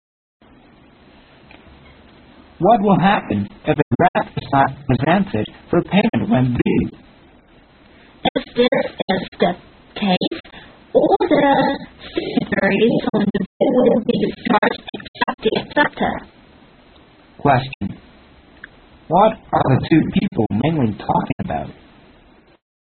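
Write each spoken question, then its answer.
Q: What are the two people mainly talking about?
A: What happens if a draft is not presented for payment when due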